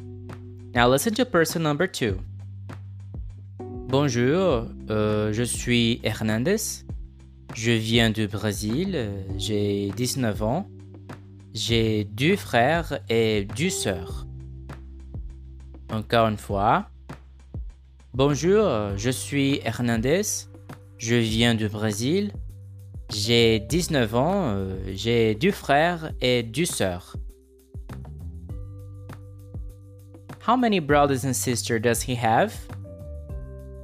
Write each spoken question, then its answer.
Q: How many brothers and sisters does he have?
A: Deux frères et deux sœurs.